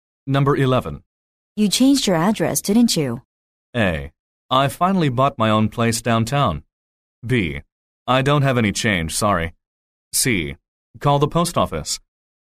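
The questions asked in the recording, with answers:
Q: You changed your address, didn't you?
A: A: I finally bought my own place downtown.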